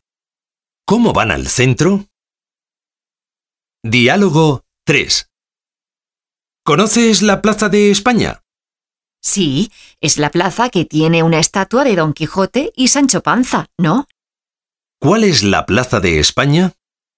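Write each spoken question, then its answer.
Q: ¿Cuál es la Plaza de España?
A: La plaza que tiene una estatua de Don Quijote y Sancho Panza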